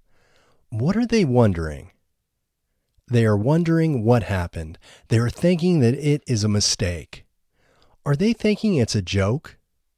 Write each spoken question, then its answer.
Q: Are they thinking it's a joke?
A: No, they aren't thinking it's a joke.